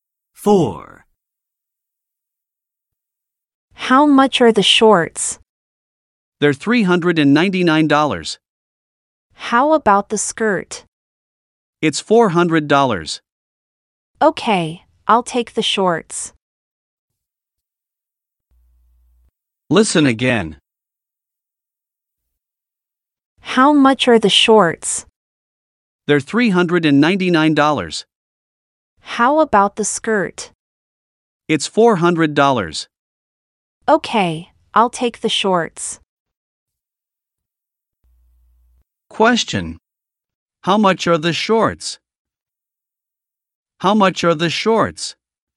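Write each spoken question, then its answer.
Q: Question. How much are the shorts?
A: $399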